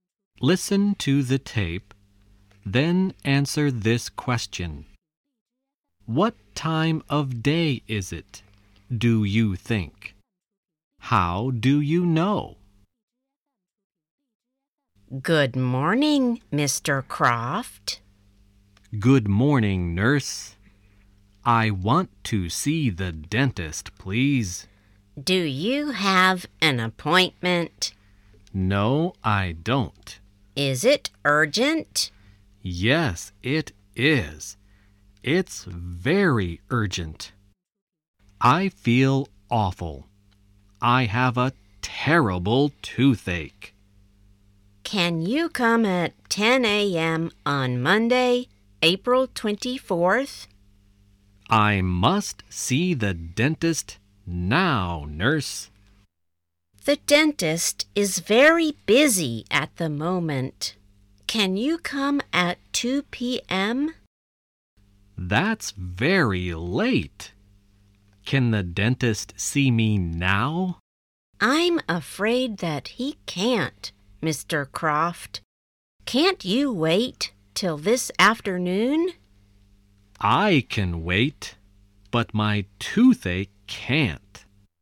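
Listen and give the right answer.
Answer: Morning (they say "Good morning")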